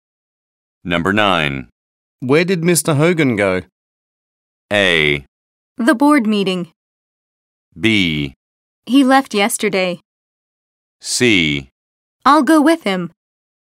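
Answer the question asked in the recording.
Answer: A: The board meeting.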